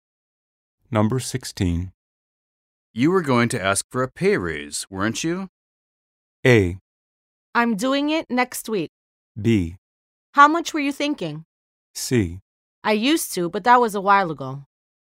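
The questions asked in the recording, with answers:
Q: You were going to ask for a pay raise, weren't you?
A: A: I'm doing it next week.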